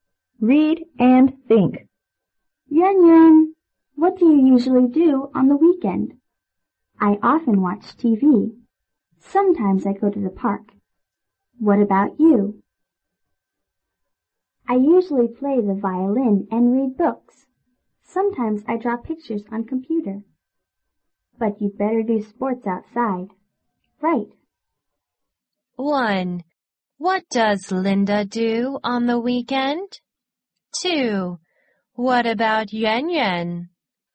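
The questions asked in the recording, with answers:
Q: What about Yuan Yuan?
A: She often watches TV; sometimes she goes to the park.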